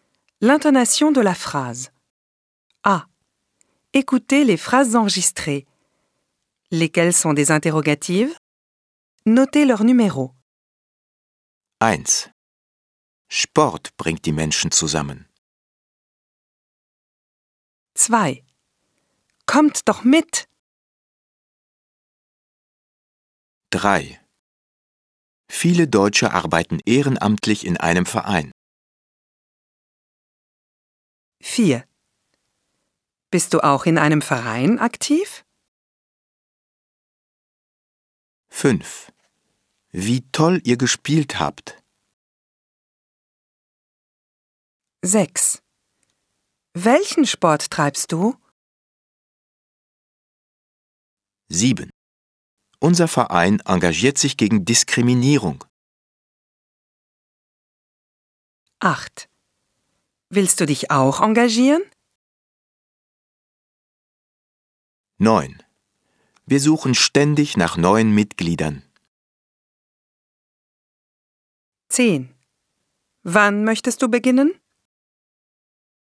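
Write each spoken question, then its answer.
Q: Lesquelles sont des interrogatives?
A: 4, 6, 8 et 10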